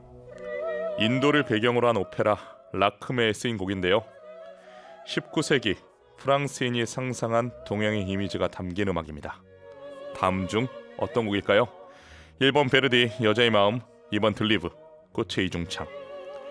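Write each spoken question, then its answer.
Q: 다음 중 어떤 곡일까요? 1번 베르디 여자의 마음, 2번 들리브 꽃의 이중창.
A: 2번: 들리브 꽃의 이중창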